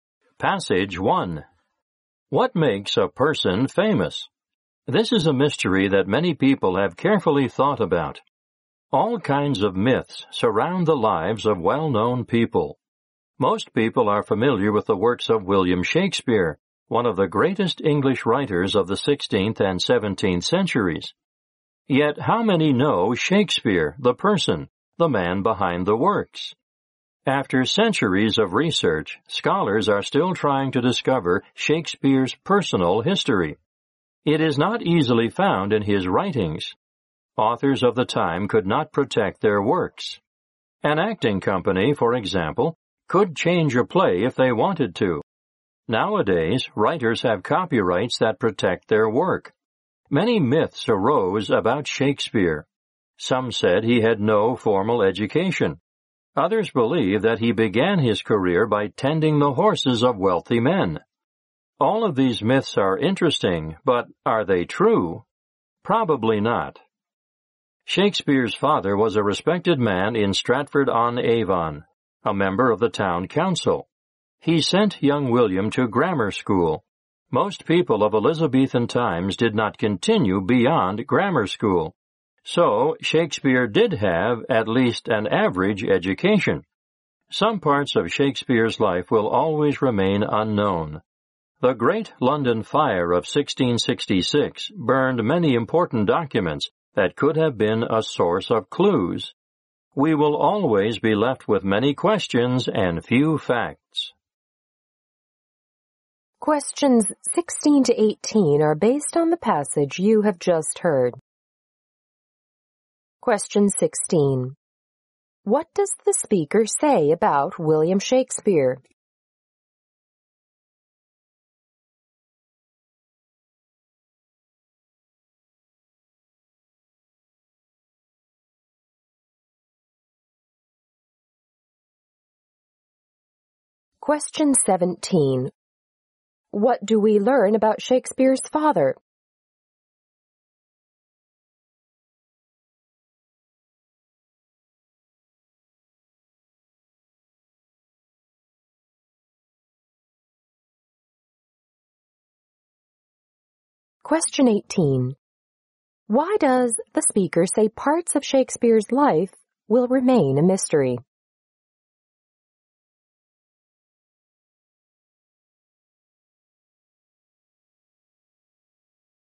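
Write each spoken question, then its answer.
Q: What does the speaker say about William Shakespeare?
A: Little is known about his personal life.

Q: What do we learn about Shakespeare's father?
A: He was a respected man and a member of the town council.

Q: Why does the speaker say parts of Shakespeare's life will remain a mystery?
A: Many important documents were burned in the Great London Fire of 1666.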